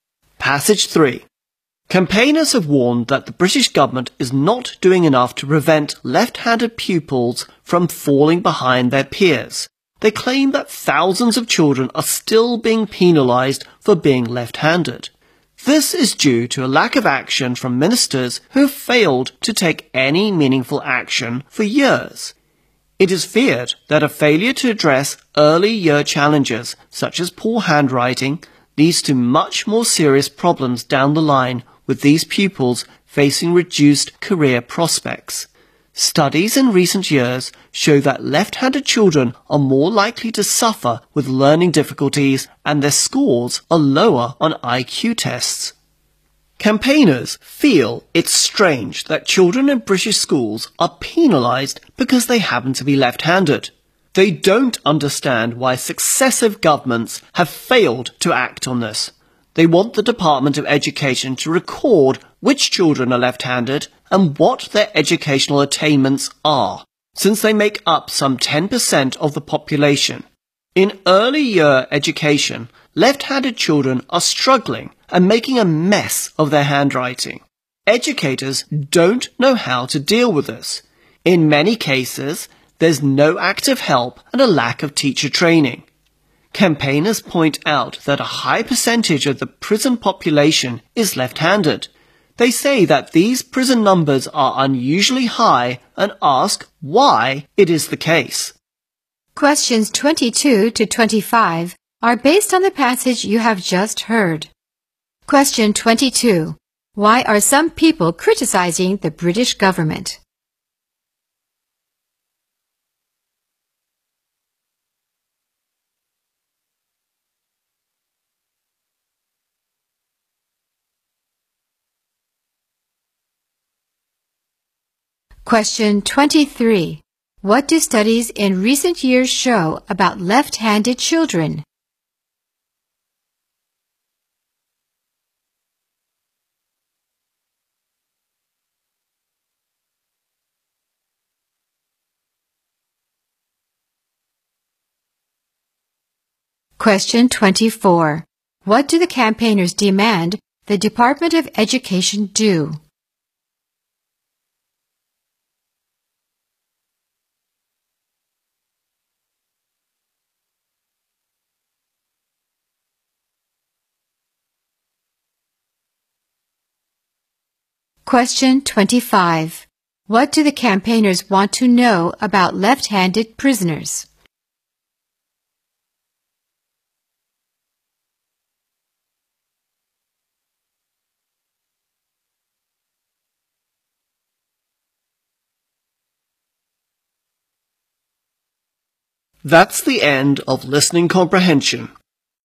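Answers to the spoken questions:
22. It is not doing enough to stop left-handed pupils from falling behind
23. They are more likely to have learning difficulties and score lower on IQ tests
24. Record which children are left-handed and what they achieve in education
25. Why their numbers are unusually high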